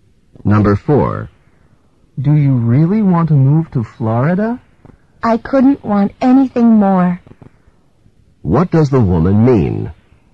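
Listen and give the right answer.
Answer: She really wants to move to Florida.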